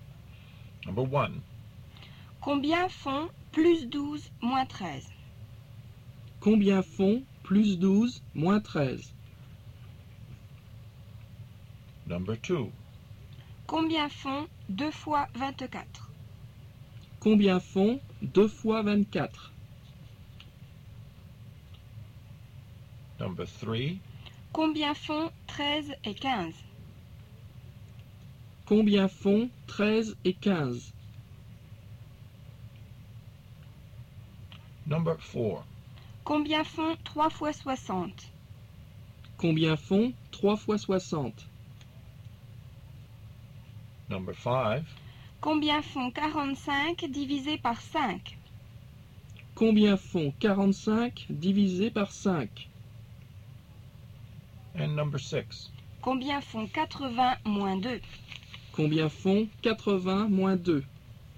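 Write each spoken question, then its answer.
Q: Combien font 2 fois 24?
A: 48

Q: Combien font 13 et 15?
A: 28

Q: Combien font 3 fois 60?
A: 180

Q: Combien font 80 moins 2?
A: 78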